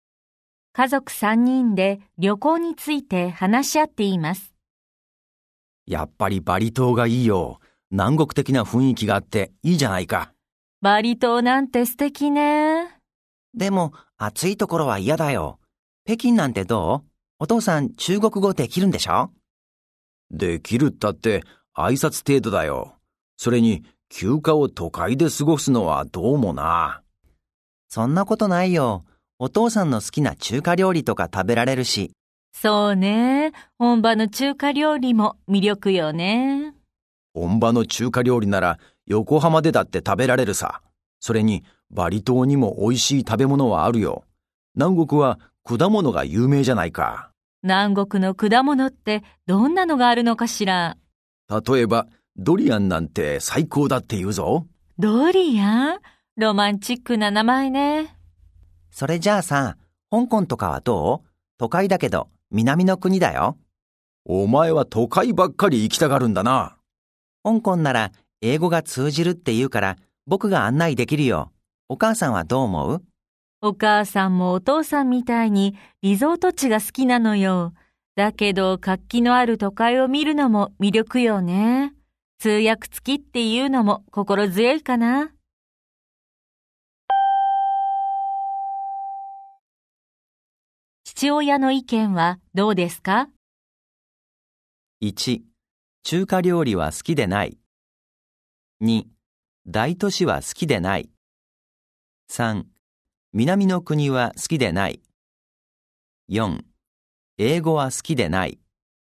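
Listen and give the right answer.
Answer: 2: 大都市は好きでない。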